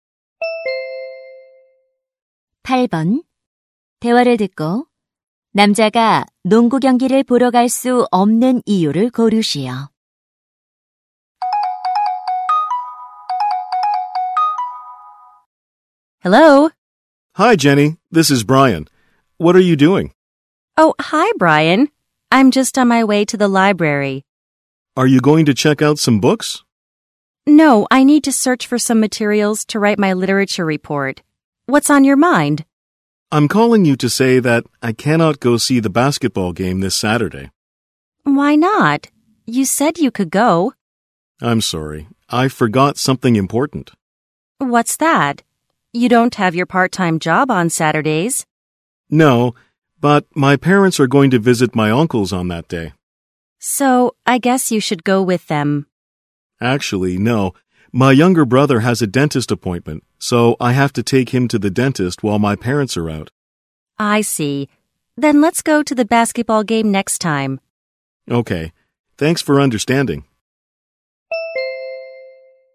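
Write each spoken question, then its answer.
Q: 대화를 듣고 남자가 농구 경기를 보러 갈 수 없는 이유를 고르시오.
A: 남동생을 치과에 데려가야 해서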